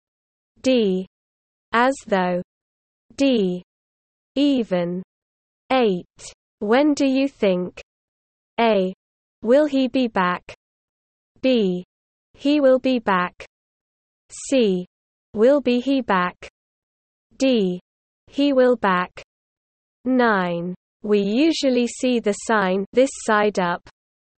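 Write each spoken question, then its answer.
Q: When do you think?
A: B: He will be back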